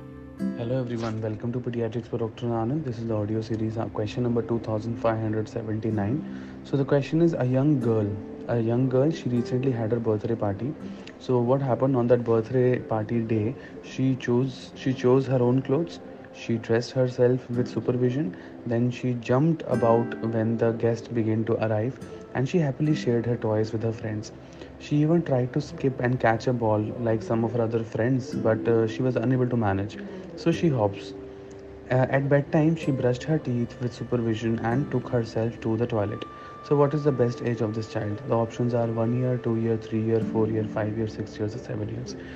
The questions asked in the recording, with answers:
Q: So, what is the best age of this child?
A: The answer for that question would be the best answer is 4 years.